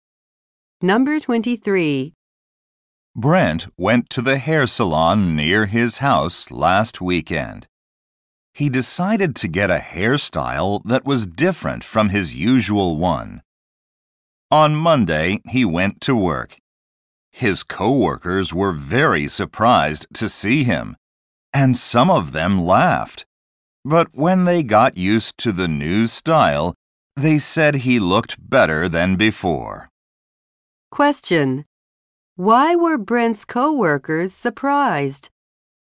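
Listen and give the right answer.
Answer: He had a different hairstyle.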